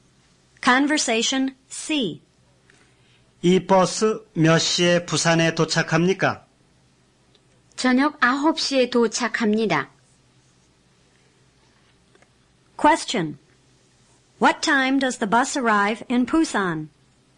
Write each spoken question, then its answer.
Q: What time does the bus arrive in Busan?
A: 9 p.m.